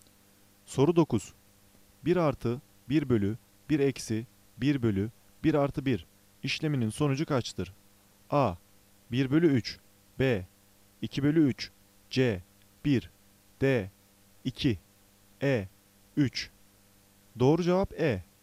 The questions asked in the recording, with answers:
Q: 1 artı 1 bölü 1 eksi 1 bölü 1 artı 1 işleminin sonucu kaçtır?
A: Doğru cevap E. 3